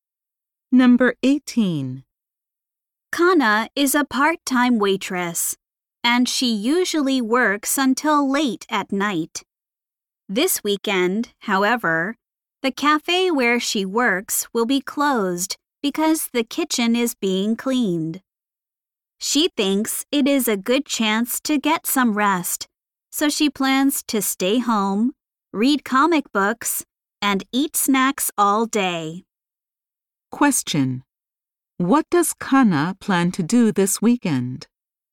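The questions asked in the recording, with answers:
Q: What does Kana plan to do this weekend?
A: Stay home, read comic books, and eat snacks.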